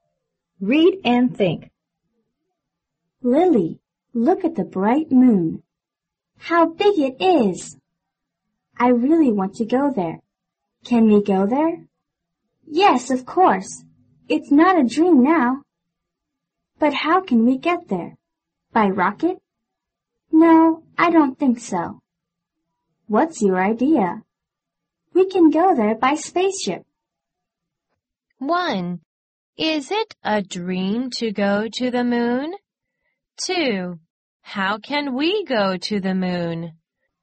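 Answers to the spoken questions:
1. No, it's not a dream now.
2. By spaceship.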